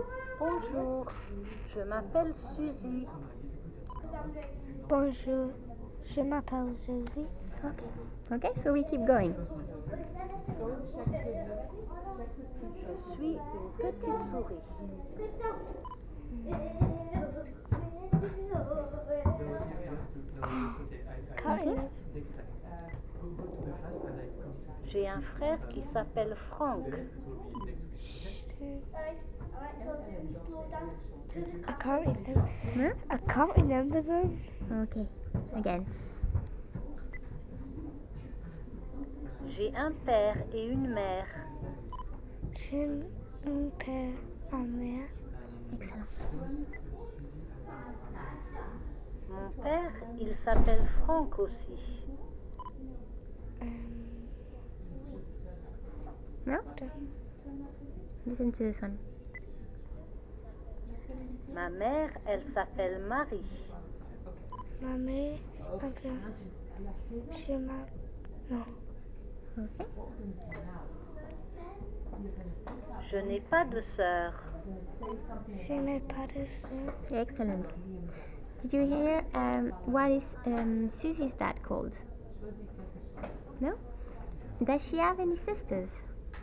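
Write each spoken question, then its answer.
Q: Did you hear what is Susie's dad called?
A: Franck

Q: Does she have any sisters?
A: No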